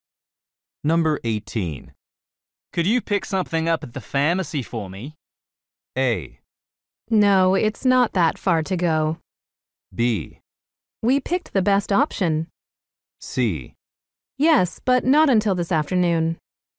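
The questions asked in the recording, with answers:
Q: Could you pick something up at the pharmacy for me?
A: C: Yes, but not until this afternoon.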